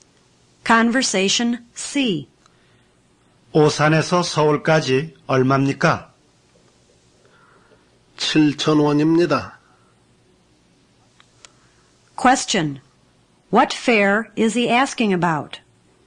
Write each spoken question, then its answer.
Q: What fare is he asking about?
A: He's asking about the fare from Osan to Seoul.